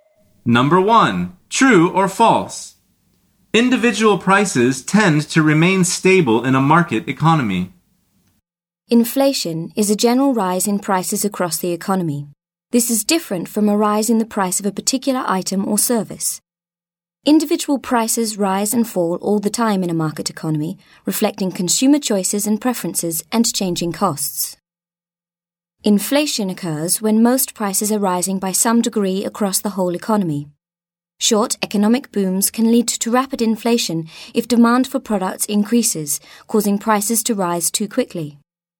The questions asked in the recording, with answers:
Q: True or false? Individual prices tend to remain stable in a market economy.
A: The answer is false.